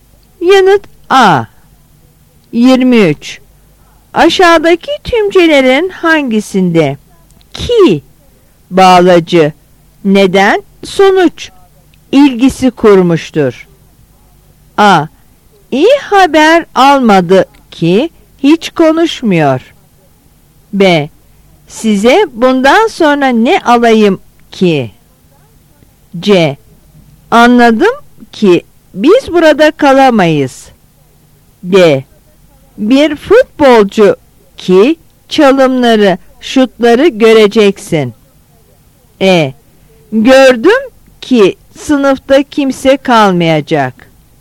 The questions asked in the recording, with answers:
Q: Aşağıdaki tümcelerin hangisinde ki bağlacı neden sonuç ilgisi kurmuştur?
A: Yanıt A.